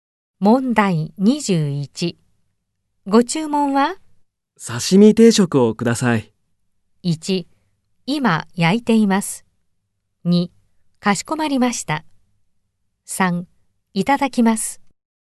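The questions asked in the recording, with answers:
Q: ご注文は?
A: 3: かしこまりました。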